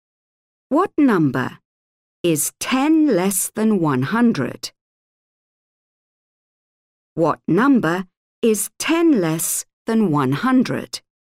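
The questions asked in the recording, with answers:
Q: What number is 10 less than 100?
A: 90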